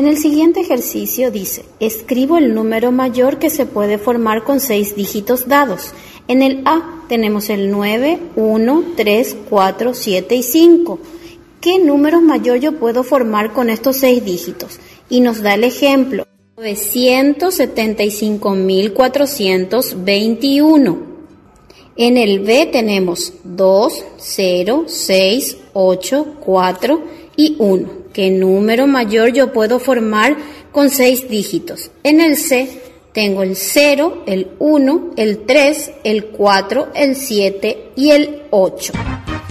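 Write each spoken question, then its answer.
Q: ¿Qué número mayor yo puedo formar con 6 dígitos?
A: 864.210

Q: En el C tengo el 0, el 1, el 3, el 4, el 7 y el 8.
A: 874.310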